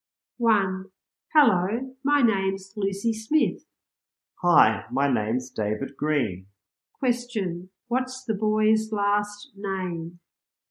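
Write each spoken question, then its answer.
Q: Question, what's the boy's last name?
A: Green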